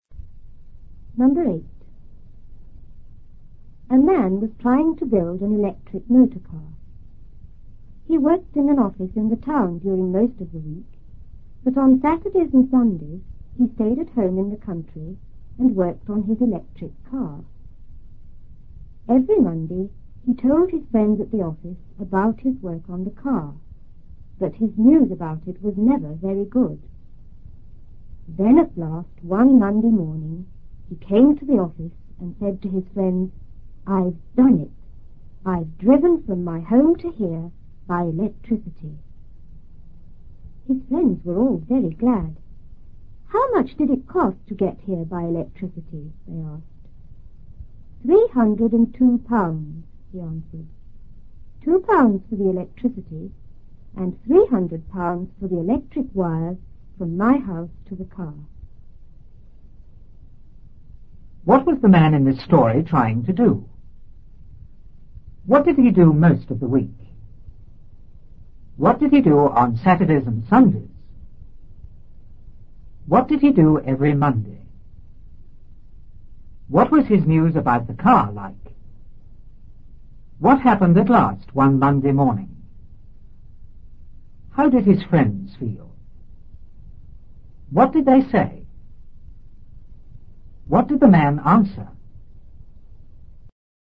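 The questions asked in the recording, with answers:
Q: What was the man in this story trying to do?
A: Build an electric motor car

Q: What did he do most of the week?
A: He worked in an office in the town

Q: What did he do on Saturdays and Sundays?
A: He stayed at home in the country and worked on his electric car

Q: What did he do every Monday?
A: He told his friends at the office about his work on the car

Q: What was his news about the car like?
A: Never very good

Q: What happened at last one Monday morning?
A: He said he had driven from his home to the office by electricity

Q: How did his friends feel?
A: Very glad

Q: What did they say?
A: How much did it cost to get here by electricity?

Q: What did the man answer?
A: £302: £2 for the electricity and £300 for the wires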